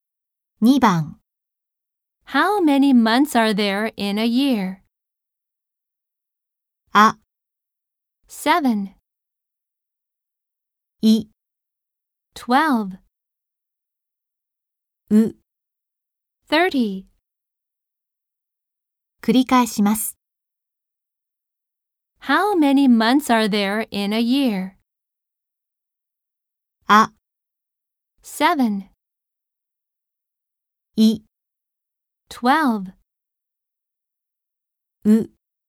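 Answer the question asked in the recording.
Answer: い: 12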